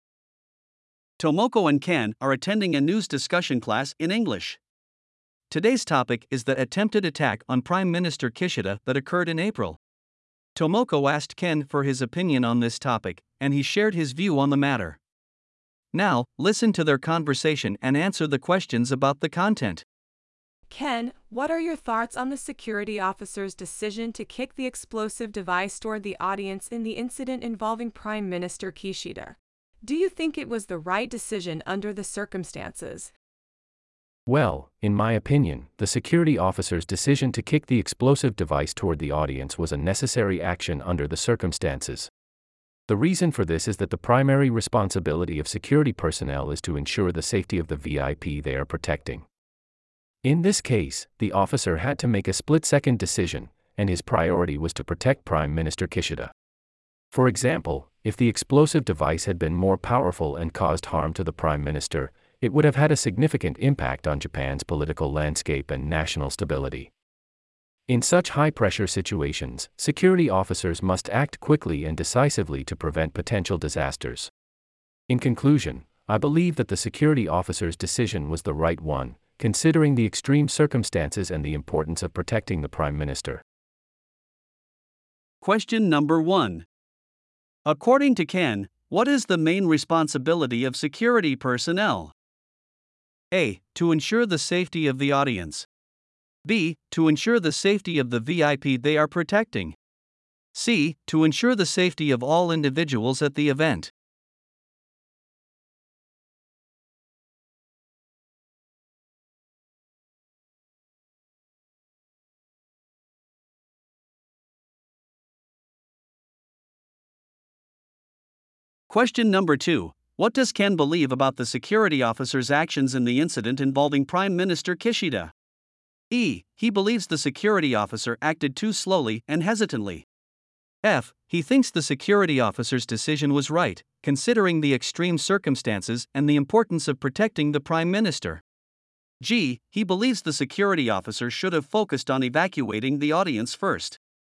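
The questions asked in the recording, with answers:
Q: According to Ken, what is the main responsibility of security personnel?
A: B: To ensure the safety of the VIP they are protecting.

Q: What does Ken believe about the security officer's actions in the incident involving Prime Minister Kishida?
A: F: He thinks the security officer's decision was right, considering the extreme circumstances and the importance of protecting the Prime Minister.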